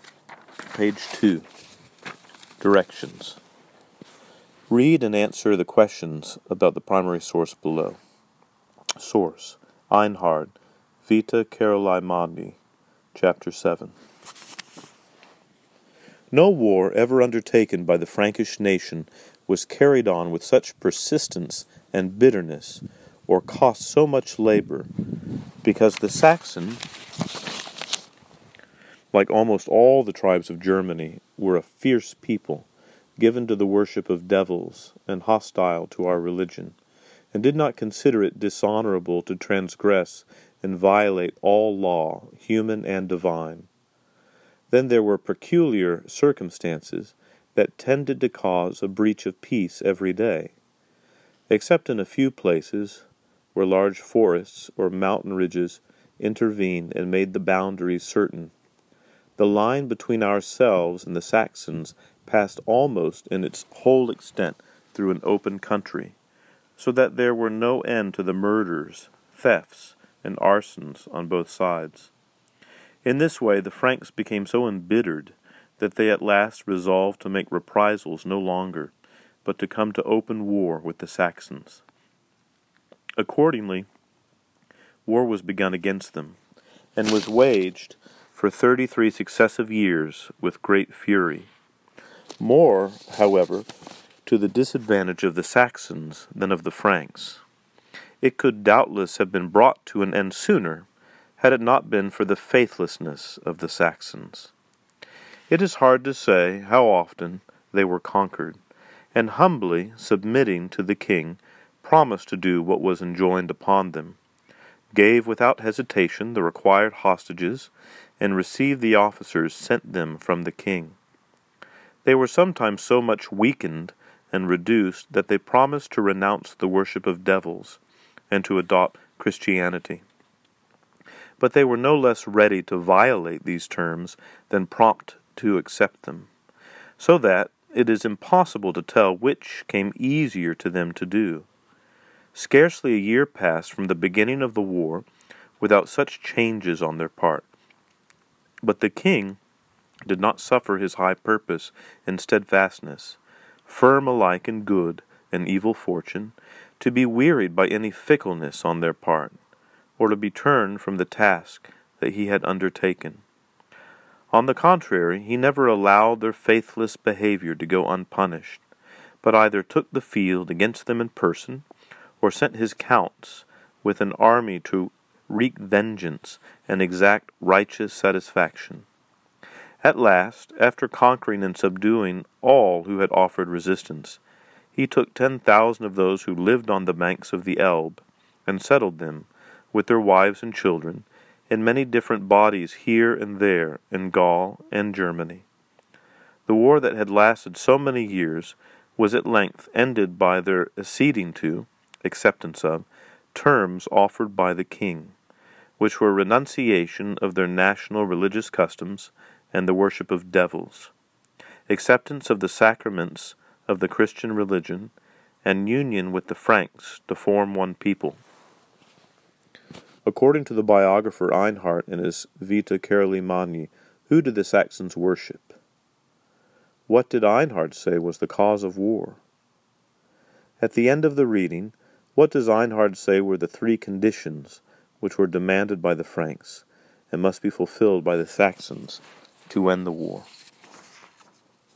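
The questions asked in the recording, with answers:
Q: According to the biographer Einhard in his Vita Caroli Magni, who did the Saxons worship?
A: Devils

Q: What did Einhard say was the cause of war?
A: The open border led to endless murders, thefts and arsons on both sides, so the Franks decided on open war

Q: At the end of the reading, what does Einhard say were the three conditions which were demanded by the Franks and must be fulfilled by the Saxons to end the war?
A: Giving up their national religious customs and the worship of devils, accepting the Christian sacraments, and uniting with the Franks as one people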